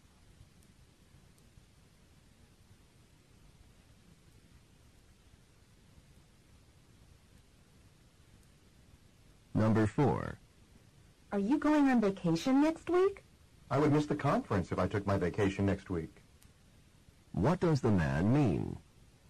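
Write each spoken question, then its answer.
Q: What does the man mean?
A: He is not going on vacation next week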